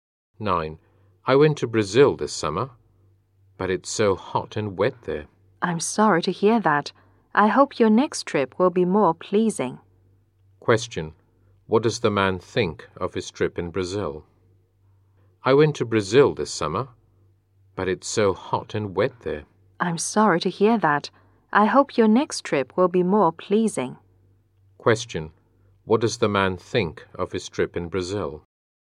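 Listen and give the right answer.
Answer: It was unpleasant because it was hot and wet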